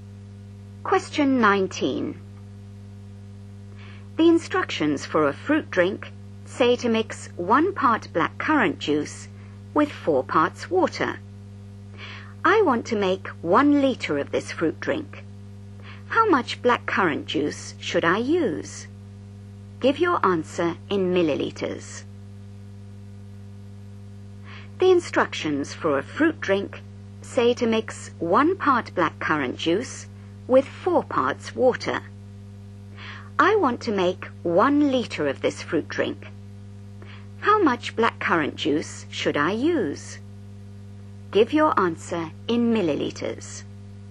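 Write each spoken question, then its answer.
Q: How much blackcurrant juice should I use?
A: 200 ml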